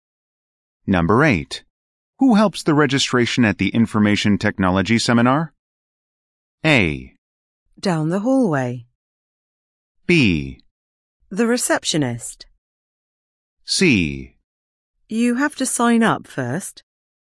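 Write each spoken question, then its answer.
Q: Who helps the registration at the Information Technology Seminar?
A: B: The receptionist.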